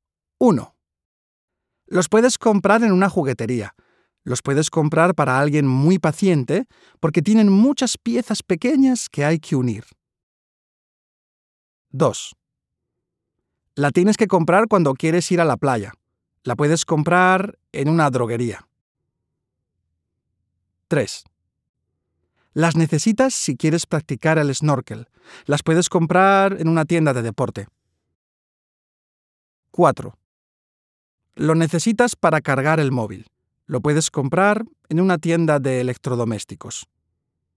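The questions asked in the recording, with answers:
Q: Los puedes comprar en una juguetería. Los puedes comprar para alguien muy paciente porque tienen muchas piezas pequeñas que hay que unir.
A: rompecabezas (puzles)

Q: Las necesitas si quieres practicar el snorkel. Las puedes comprar en una tienda de deporte.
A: gafas de buceo

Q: Lo necesitas para cargar el móvil. Lo puedes comprar en una tienda de electrodomésticos.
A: cargador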